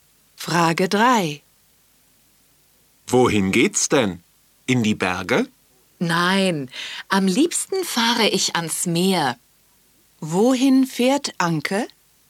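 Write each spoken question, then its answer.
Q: Wohin fährt Anke?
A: Ans Meer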